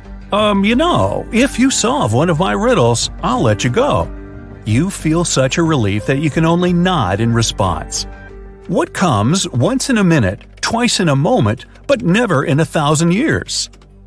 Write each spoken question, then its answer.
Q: What comes once in a minute, twice in a moment, but never in a thousand years?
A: It's the letter M.